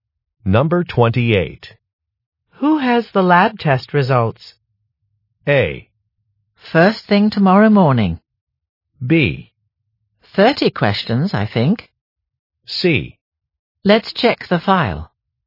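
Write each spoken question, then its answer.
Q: Who has the lab test results?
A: C: Let's check the file.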